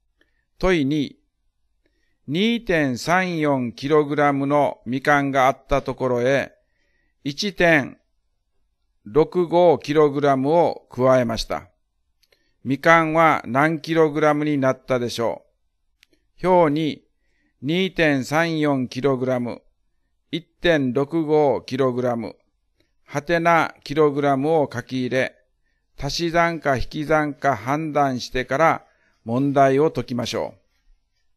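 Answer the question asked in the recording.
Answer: 3.99kg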